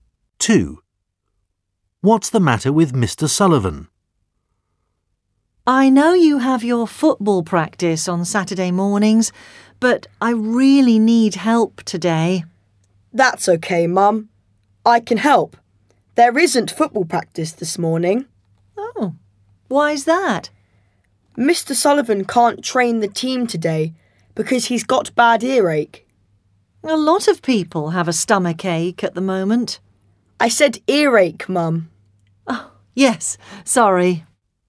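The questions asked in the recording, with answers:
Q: What's the matter with Mr.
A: He's got bad earache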